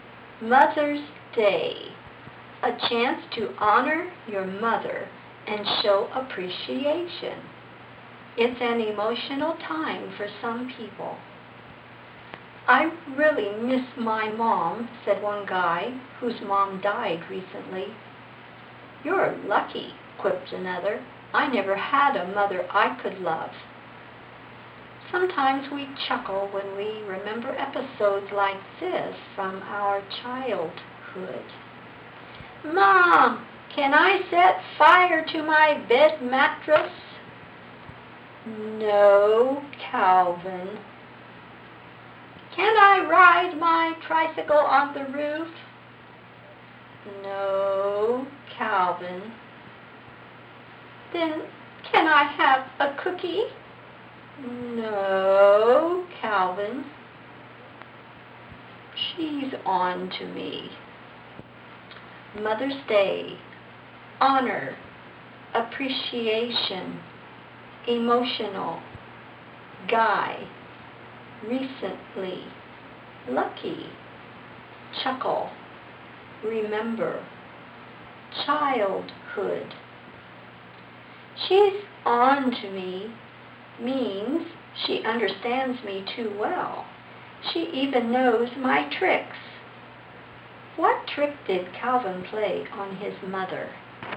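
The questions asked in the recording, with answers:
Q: What trick did Calvin play on his mother?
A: He asked for silly, dangerous things first, hoping she would then say yes to a cookie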